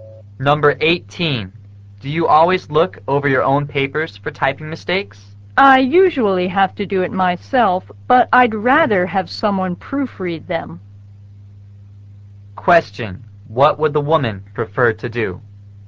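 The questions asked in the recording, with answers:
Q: What would the woman prefer to do?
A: Have someone else proofread her papers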